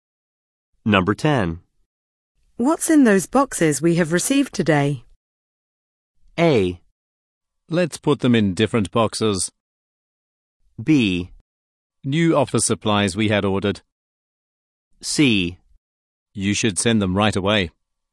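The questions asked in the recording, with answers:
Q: What's in those boxes we have received today?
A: B: New office supplies we had ordered.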